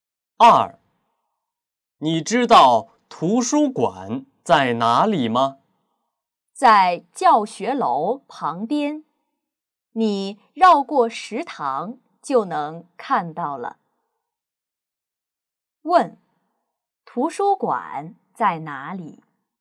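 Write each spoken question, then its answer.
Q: 图书馆在哪里?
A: 在教学楼旁边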